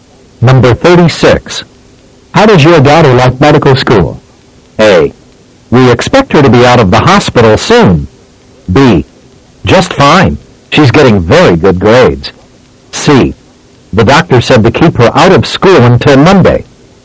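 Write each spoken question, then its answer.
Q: How does your daughter like medical school?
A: B: Just fine. She's getting very good grades.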